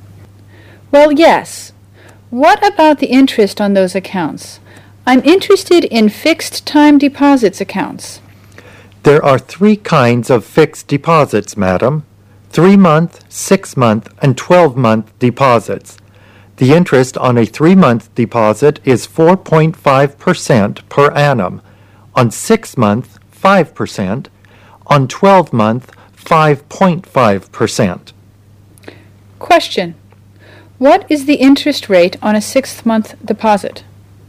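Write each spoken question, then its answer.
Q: What is the interest rate on a 6-month deposit?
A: 5% per annum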